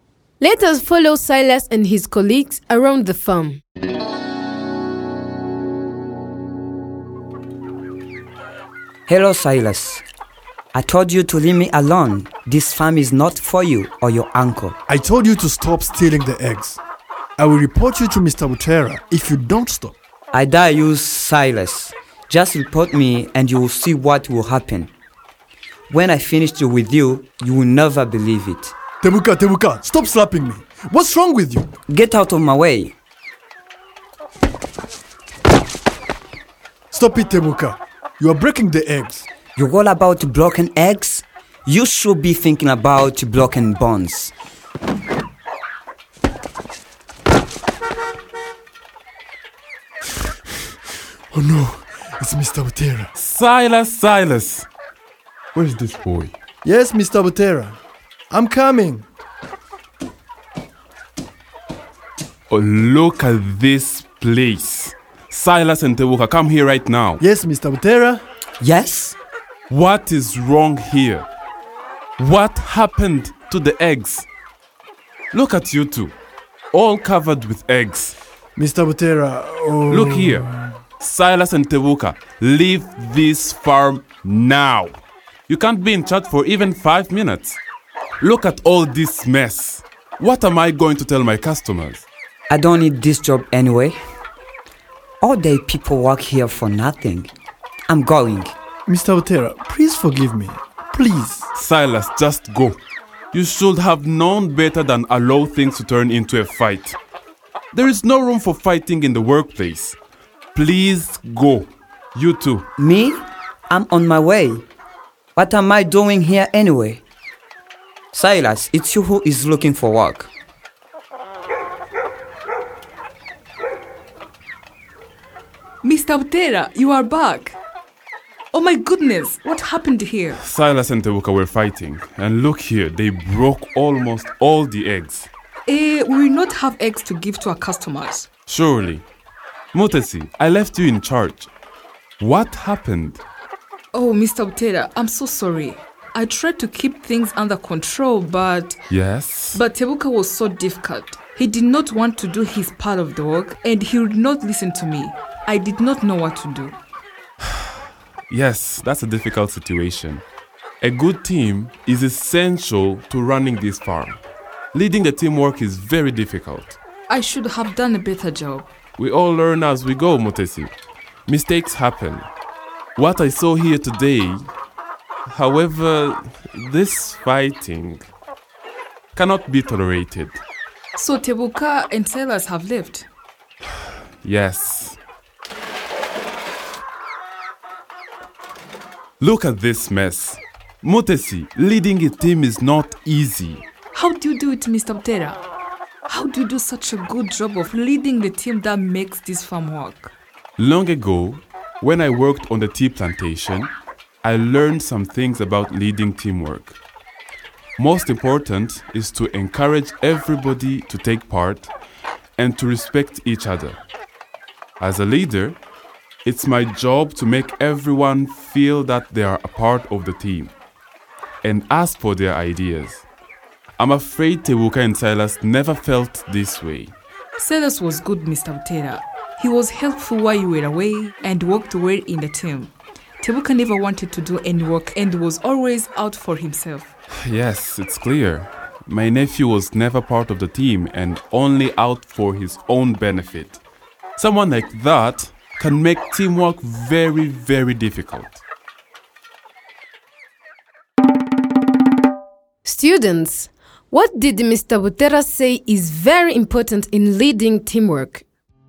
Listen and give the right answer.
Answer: to encourage team members to take part fully, to respect others, and to make them feel a part of the team.